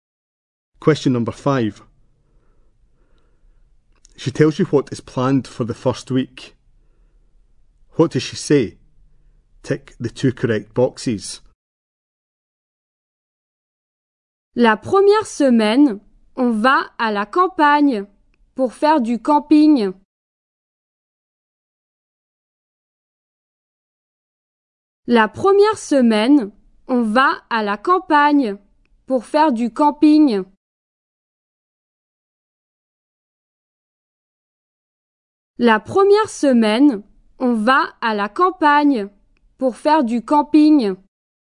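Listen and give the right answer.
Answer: Going to the countryside to camp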